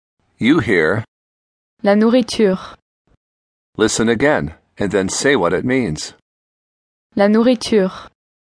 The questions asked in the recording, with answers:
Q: Listen again. And then say what it means.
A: The food.